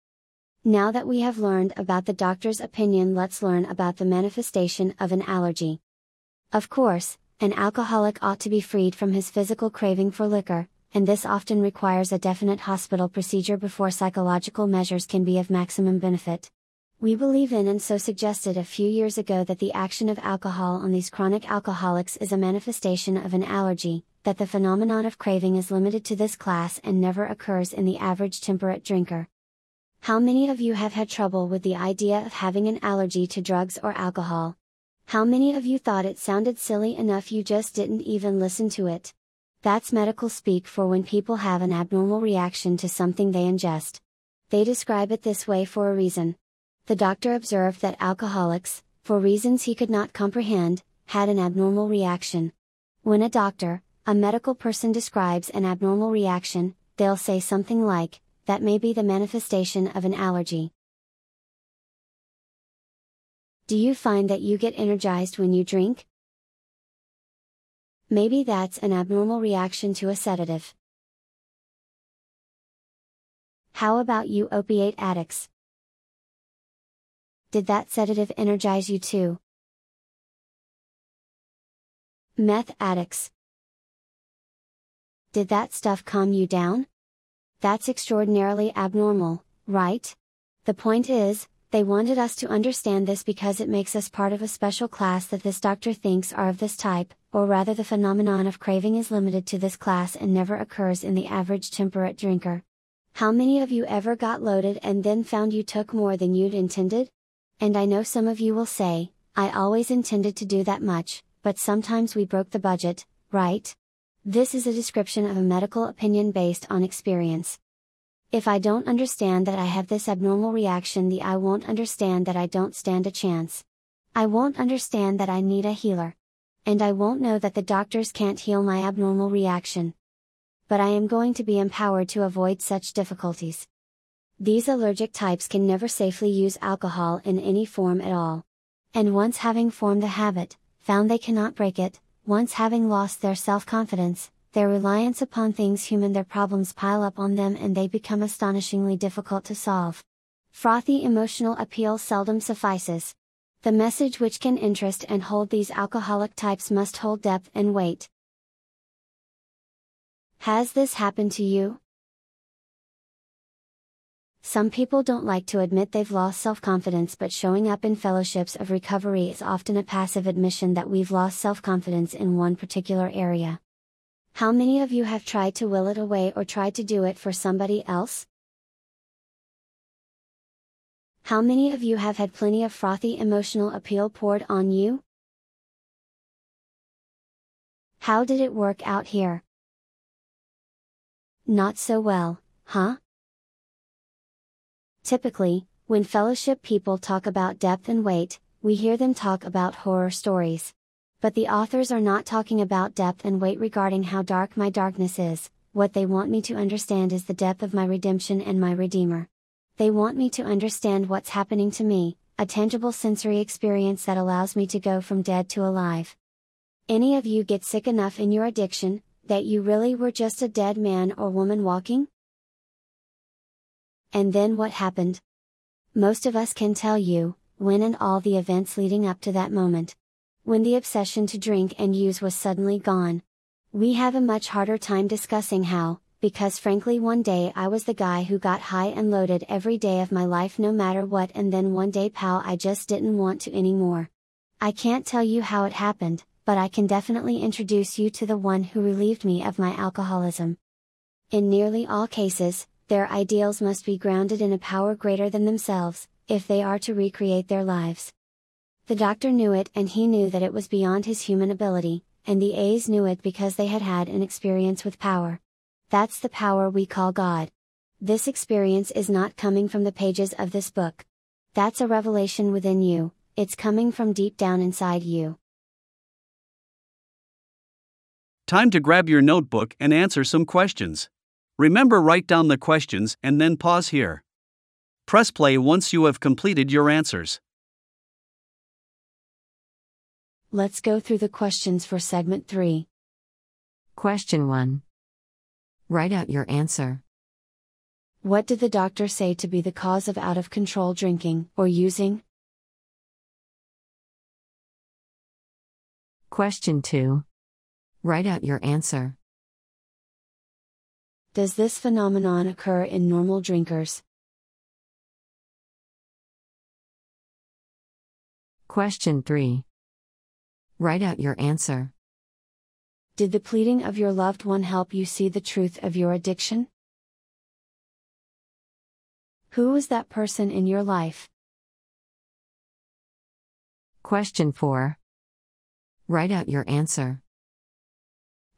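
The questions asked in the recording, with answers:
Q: What did the doctor say to be the cause of out-of-control drinking or using?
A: A manifestation of an allergy (the phenomenon of craving)

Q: Does this phenomenon occur in normal drinkers?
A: No, it never occurs in the average temperate drinker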